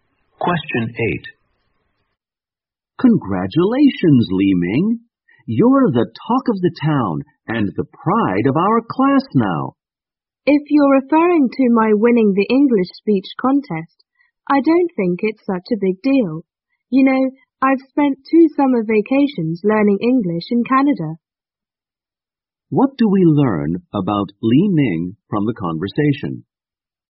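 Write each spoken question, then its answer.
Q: What do we learn about Li Ming from the conversation?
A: He won the English speech contest but thinks it's no big deal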